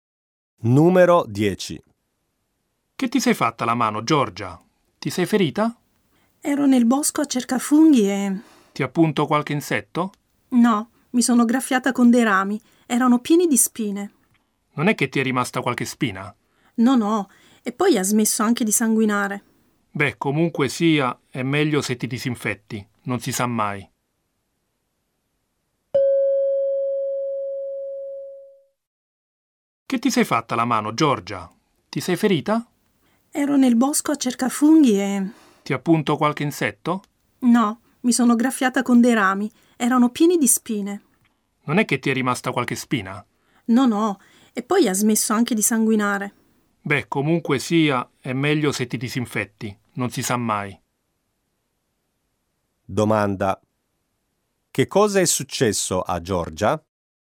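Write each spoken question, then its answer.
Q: che cosa è successo a Giorgia?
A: Si è graffiata la mano con dei rami pieni di spine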